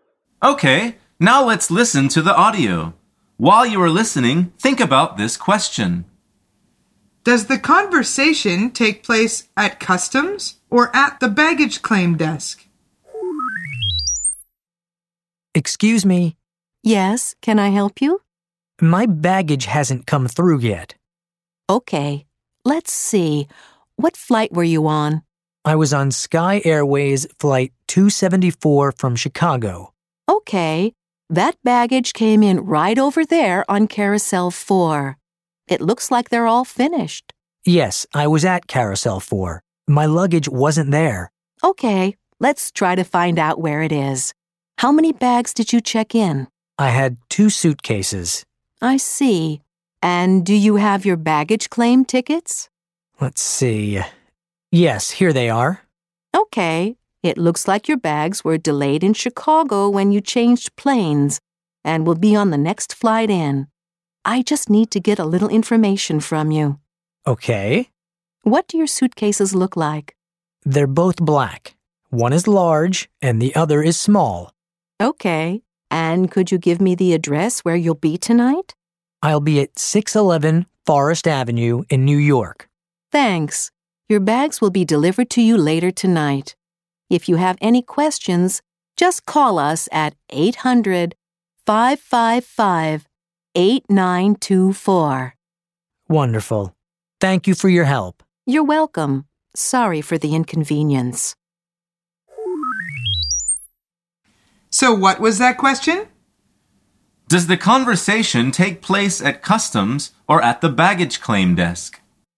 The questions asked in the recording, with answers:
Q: Does the conversation take place at customs or at the baggage claim desk?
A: The answer is at the baggage claim desk.